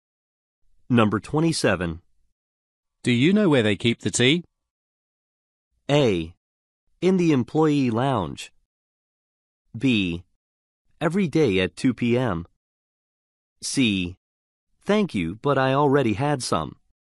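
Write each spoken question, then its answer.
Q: Do you know where they keep the tea?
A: A: In the employee lounge.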